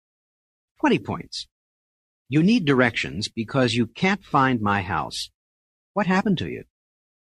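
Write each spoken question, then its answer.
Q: What happened to you?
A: I got lost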